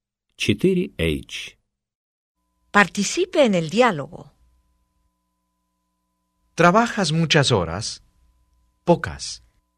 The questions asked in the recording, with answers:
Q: ¿Trabajas muchas horas? Pocas.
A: Trabajo pocas horas.